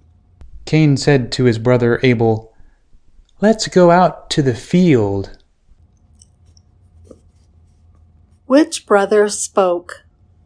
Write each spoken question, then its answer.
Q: Which brother spoke?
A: Cain spoke.